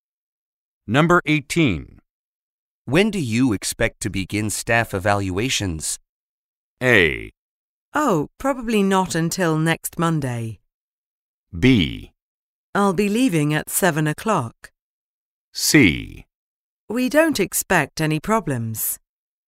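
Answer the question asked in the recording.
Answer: A: Oh, probably not until next Monday.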